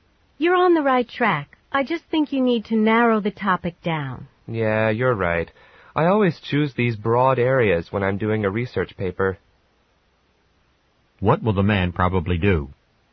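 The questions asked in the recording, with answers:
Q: What will the man probably do?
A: Narrow down his research paper topic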